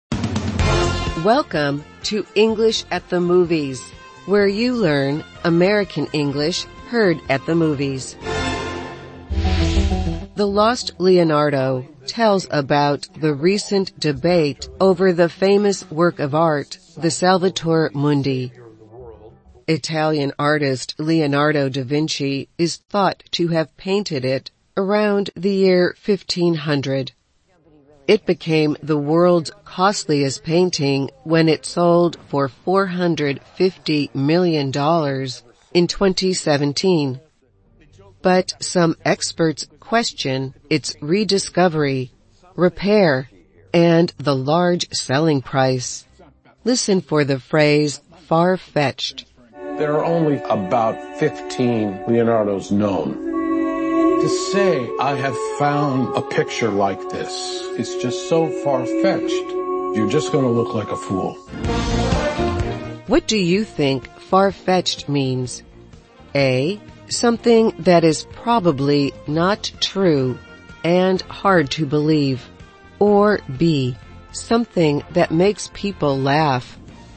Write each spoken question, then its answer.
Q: What do you think far-fetched means?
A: The answer is A. Far-fetched is something that is probably not true and hard to believe.